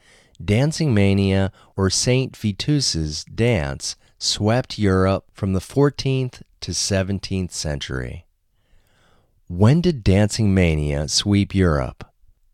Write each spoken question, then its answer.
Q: When did Dancing Mania sweep Europe?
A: Dancing Mania swept Europe from the 14th to the 17th century.